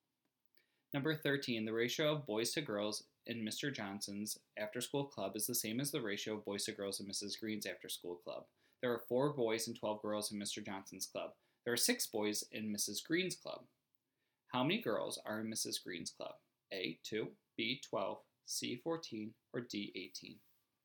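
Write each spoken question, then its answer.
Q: How many girls are in Mrs. Green's club? A, 2, B, 12, C, 14, or D, 18?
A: D: 18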